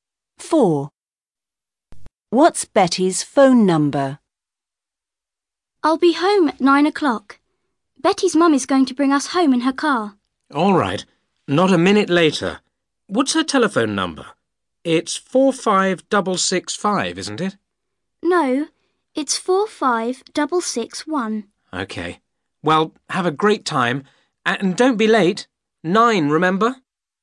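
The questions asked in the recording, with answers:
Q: What's Betty's phone number?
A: 45661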